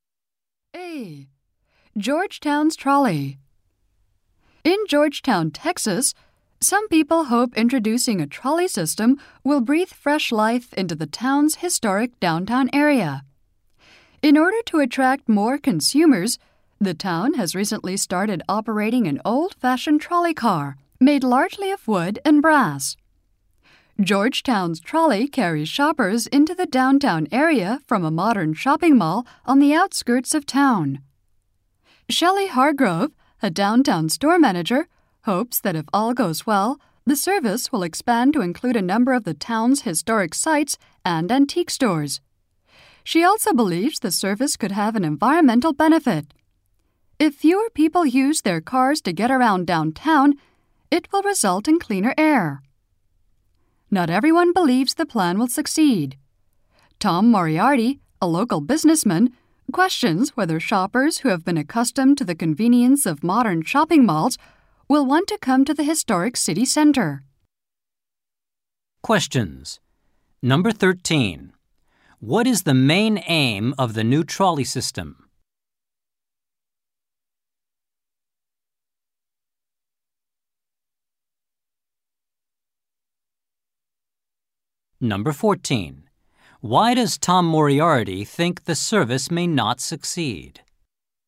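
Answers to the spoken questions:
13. To attract more shoppers to the historic downtown area.
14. Shoppers are used to the convenience of modern malls.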